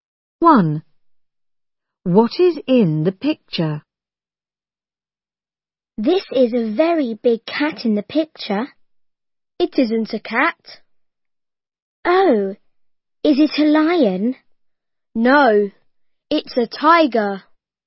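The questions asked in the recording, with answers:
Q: What is in the picture?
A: a tiger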